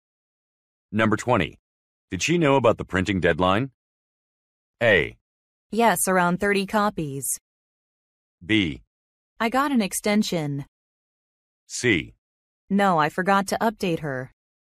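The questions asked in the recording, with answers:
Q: Did she know about the printing deadline?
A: C: No, I forgot to update her.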